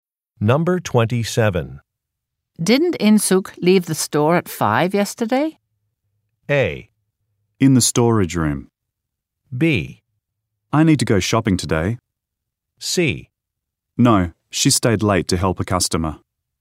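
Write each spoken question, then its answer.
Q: Didn't In-suk leave the store at 5 yesterday?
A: C: No, she stayed late to help a customer.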